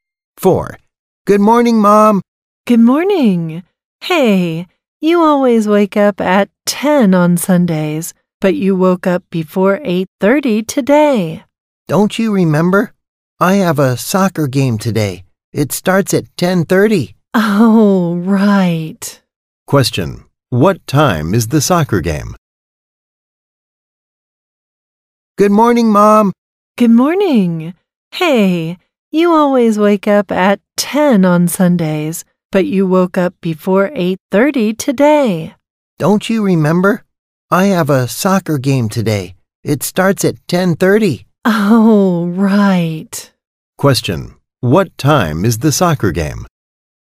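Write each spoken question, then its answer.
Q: Question, what time is the soccer game?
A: 10:30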